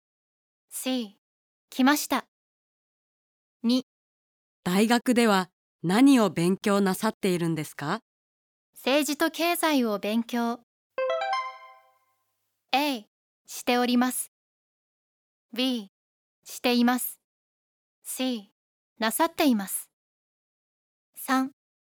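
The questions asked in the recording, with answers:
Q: 大学では何を勉強なさっているんですか?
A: A: しております。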